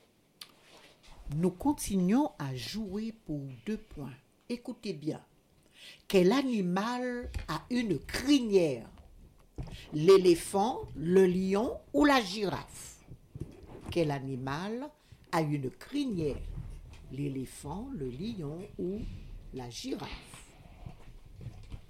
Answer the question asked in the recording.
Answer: Le lion.